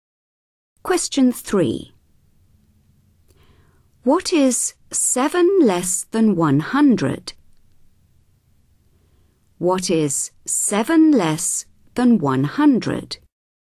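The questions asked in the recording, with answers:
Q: What is 7 less than 100?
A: 93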